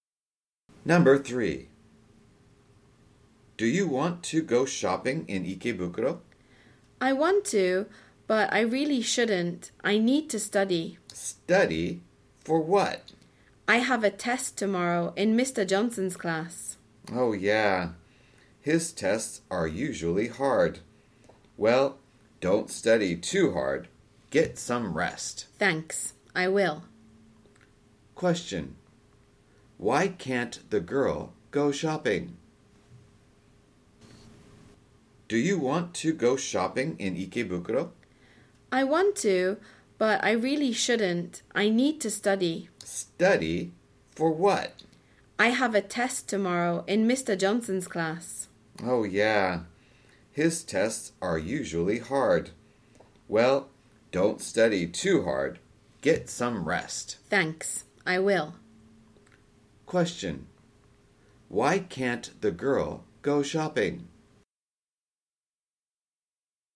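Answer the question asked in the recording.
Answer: She needs to study for a test tomorrow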